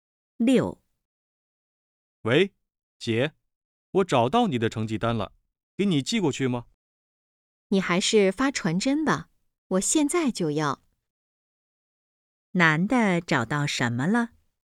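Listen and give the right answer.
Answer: 成绩单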